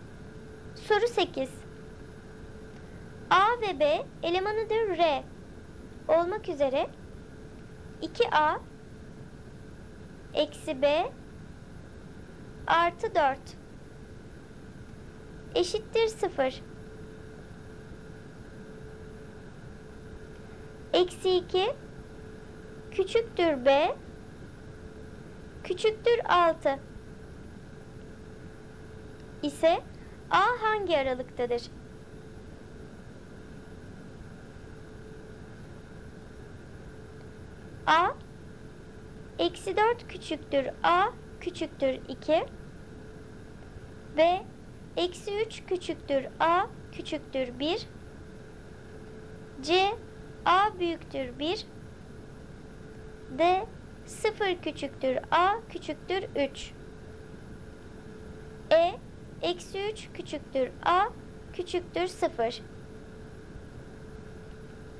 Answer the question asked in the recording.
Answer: Doğru cevap B. Eksi 3 küçüktür A küçüktür 1.